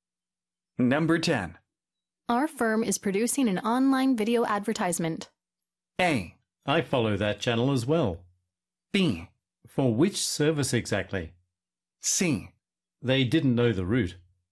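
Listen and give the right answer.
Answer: B: For which service exactly?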